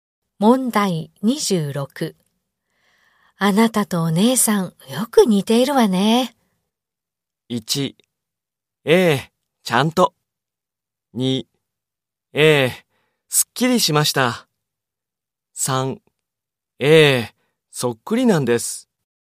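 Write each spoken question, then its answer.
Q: あなたとお姉さん、よく似ているわね。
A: 1: ええ、そっくりなんです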